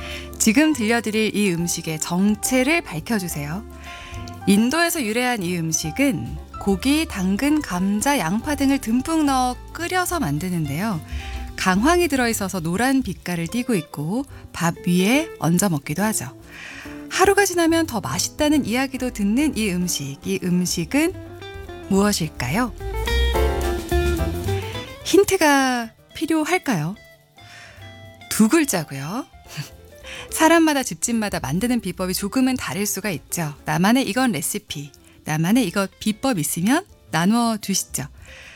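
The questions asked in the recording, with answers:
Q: 이 음식은 무엇일까요?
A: 카레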